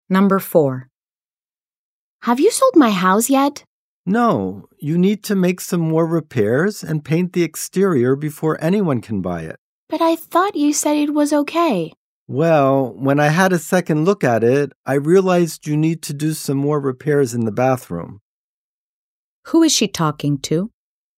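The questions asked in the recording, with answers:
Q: Who is she talking to?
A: A real estate agent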